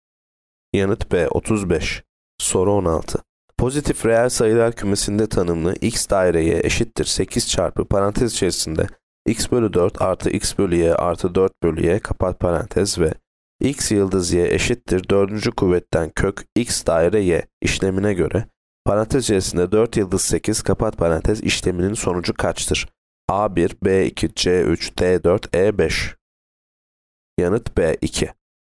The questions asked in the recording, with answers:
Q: kuvvetten kök x daire y işlemine göre parantez içerisinde 4 yıldız 8 kapat parantez işleminin sonucu kaçtır?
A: Yanıt B 2.